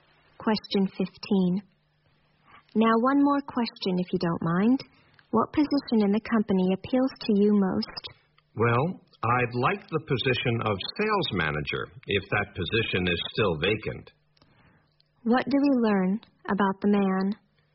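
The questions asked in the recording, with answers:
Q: What do we learn about the man?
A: He is applying for a job and would like to be sales manager.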